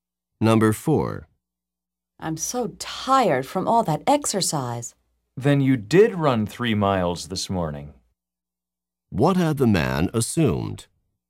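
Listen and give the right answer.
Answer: The woman had not run 3 miles this morning.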